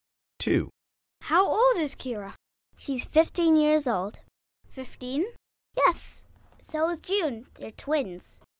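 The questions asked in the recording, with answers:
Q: How old is Kira?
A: 15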